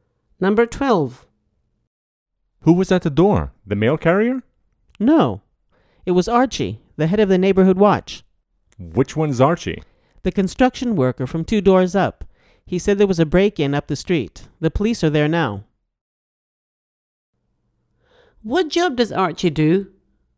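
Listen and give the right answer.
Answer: Construction worker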